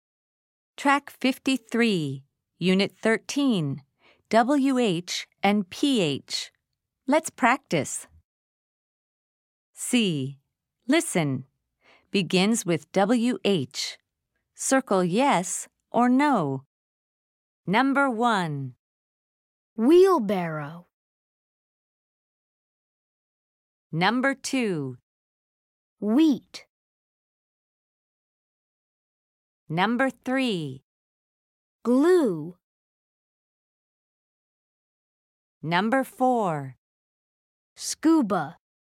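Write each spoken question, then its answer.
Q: Wheelbarrow.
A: yes

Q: Wheat.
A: yes

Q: Glue.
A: no

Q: Scuba.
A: no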